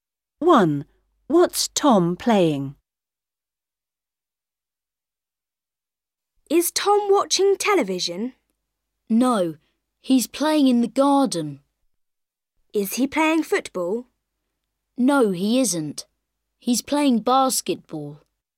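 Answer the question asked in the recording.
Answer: basketball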